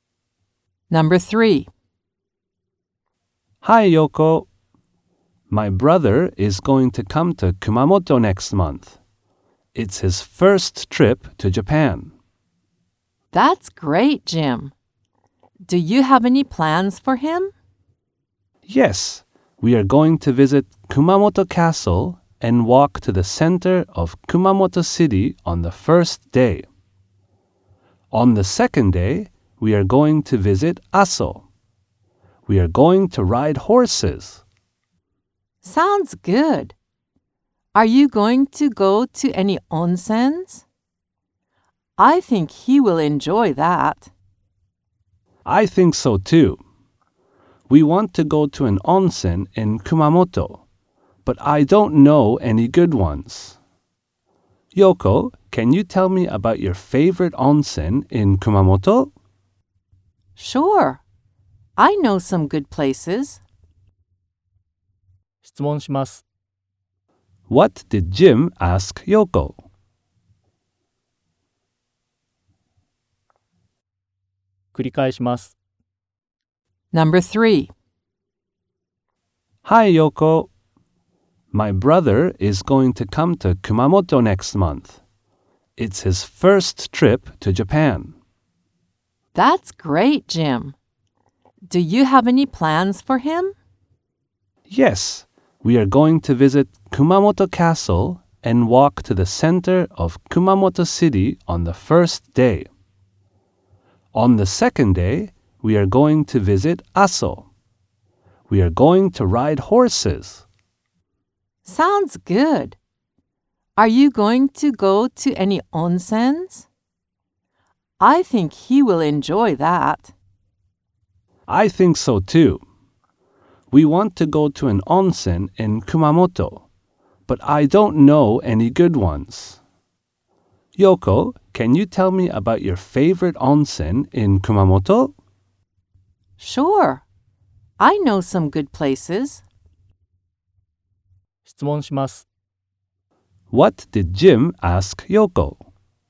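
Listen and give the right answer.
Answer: He asked her about her favorite onsen in Kumamoto.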